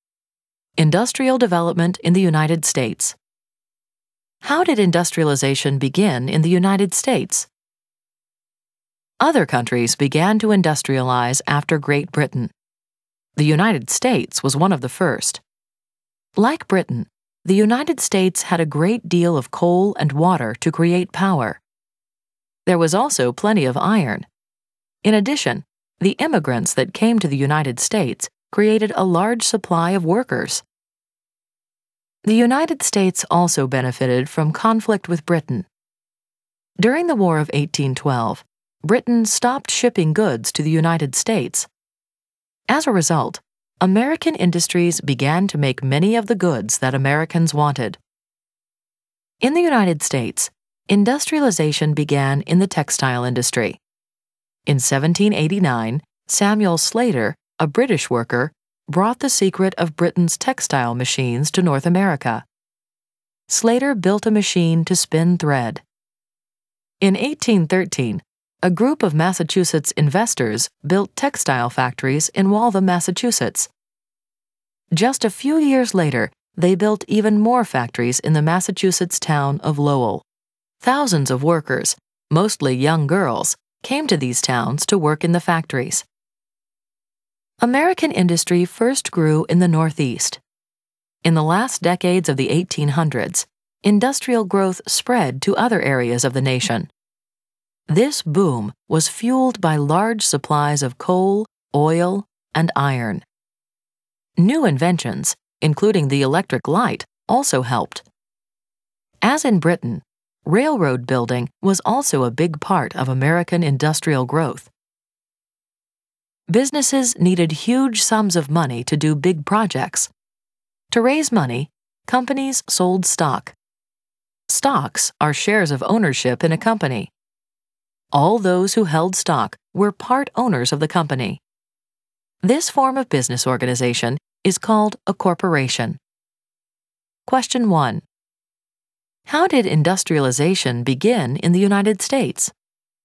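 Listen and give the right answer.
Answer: In the textile industry, helped by coal, water, iron, immigrant workers and the War of 1812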